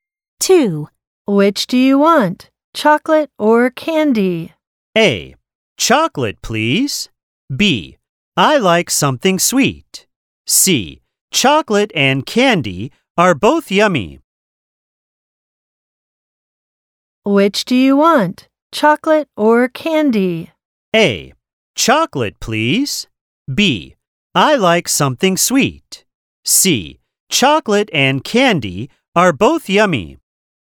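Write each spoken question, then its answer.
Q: Which do you want? Chocolate or candy?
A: A: Chocolate, please.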